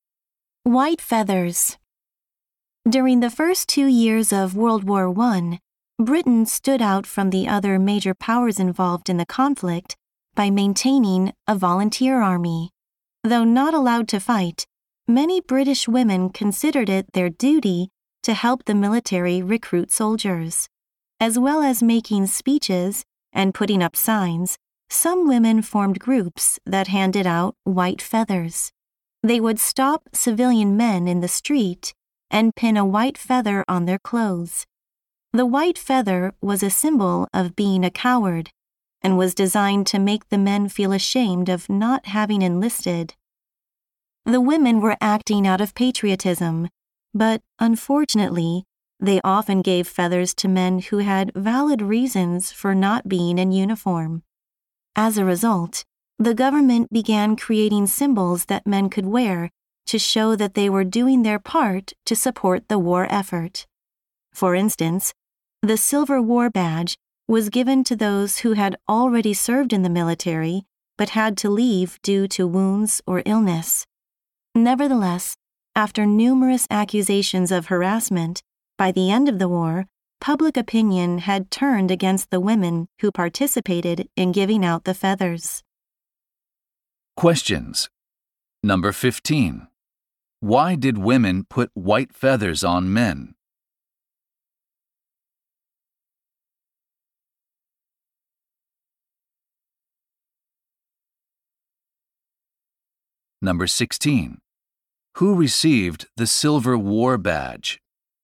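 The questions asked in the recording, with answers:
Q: Why did women put white feathers on men?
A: To shame them for not enlisting in the army

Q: Who received the Silver War Badge?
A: Men who had served but left due to wounds or illness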